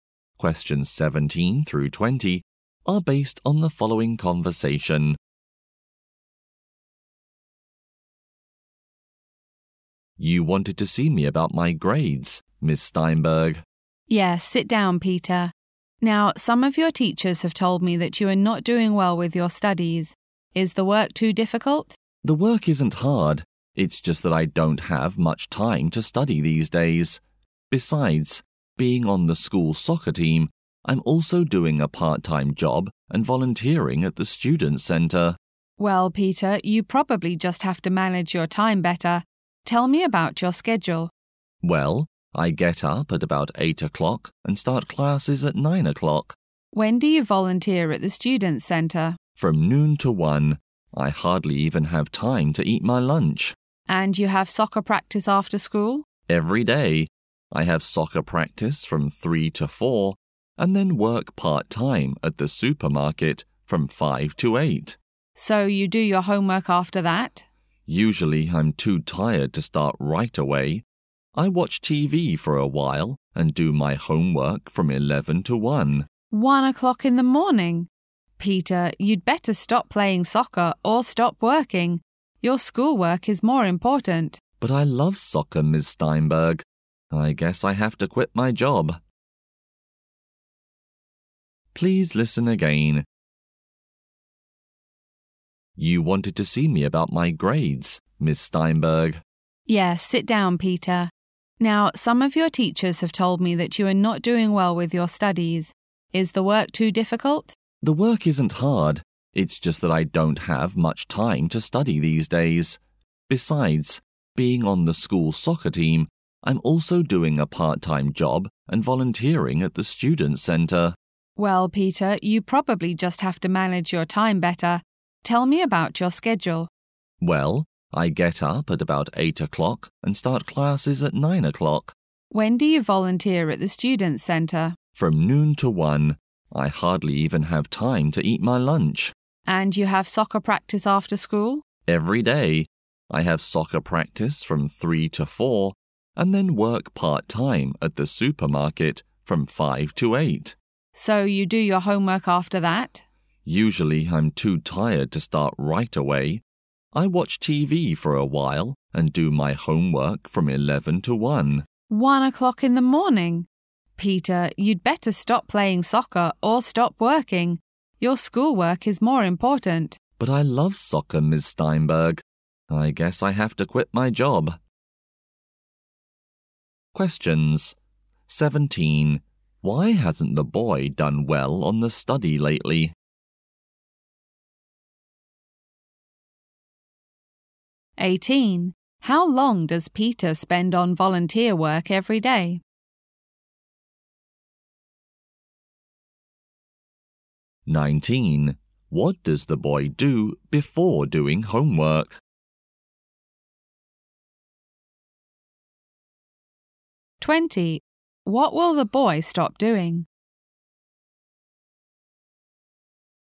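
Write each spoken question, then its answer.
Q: Why hasn't the boy done well on the study lately?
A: He doesn't have much time to study

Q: How long does Peter spend on volunteer work every day?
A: One hour

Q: What does the boy do before doing homework?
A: Watches TV

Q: What will the boy stop doing?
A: His part-time job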